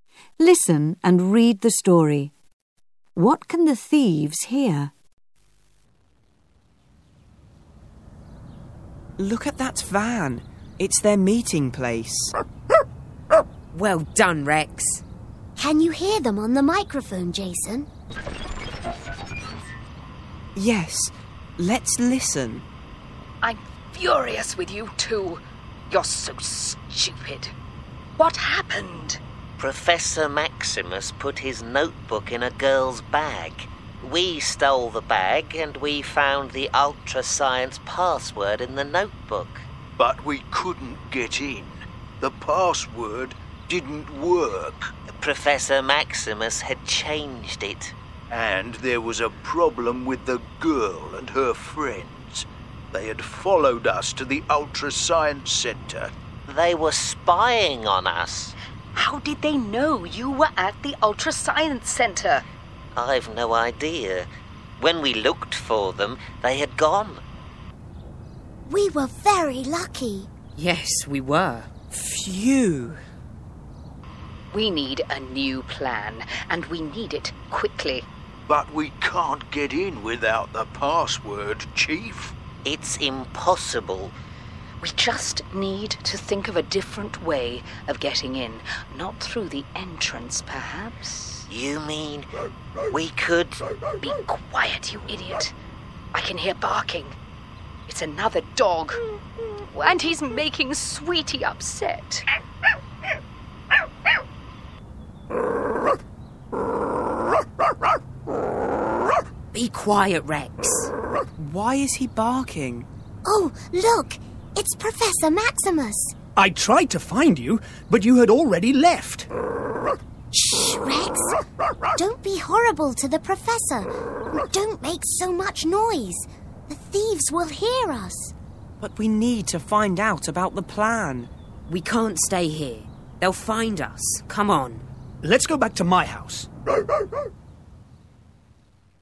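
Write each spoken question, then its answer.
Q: What can the thieves hear?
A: A dog barking (Rex).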